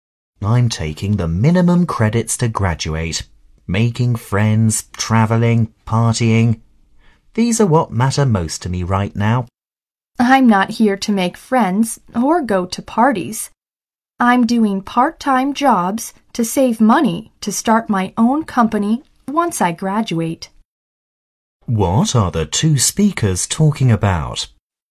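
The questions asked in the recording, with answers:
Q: What are the two speakers talking about?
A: What matters most to them at college: one wants friends and parties, the other works part-time jobs to save money.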